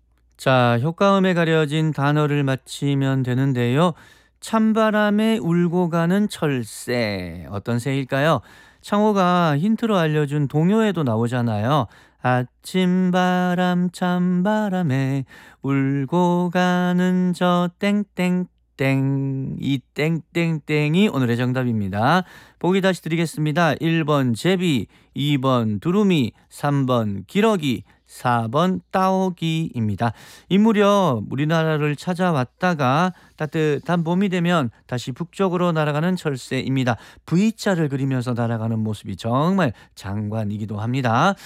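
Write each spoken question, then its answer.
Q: 찬바람에 울고 가는 철새, 어떤 새일까요?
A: 3번: 기러기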